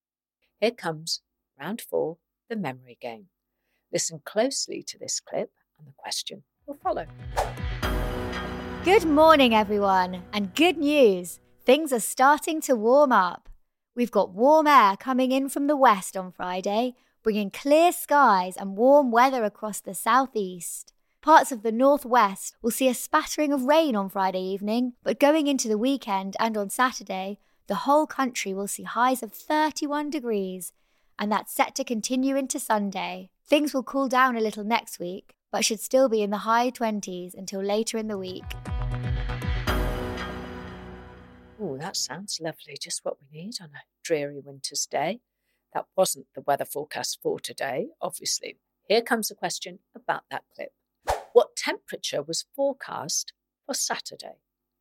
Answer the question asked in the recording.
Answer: And the answer is 31 degrees.